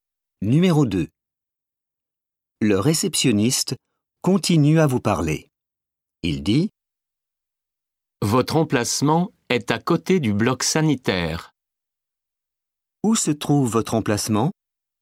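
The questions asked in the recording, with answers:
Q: Où se trouve votre emplacement?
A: À côté du bloc sanitaire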